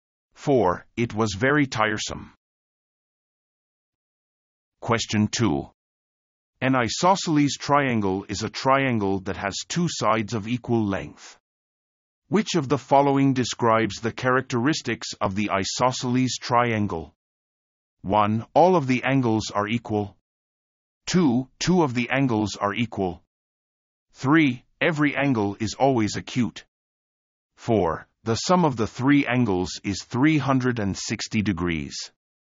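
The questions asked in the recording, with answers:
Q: Which of the following describes the characteristics of the isosceles triangle?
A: 2: Two of the angles are equal.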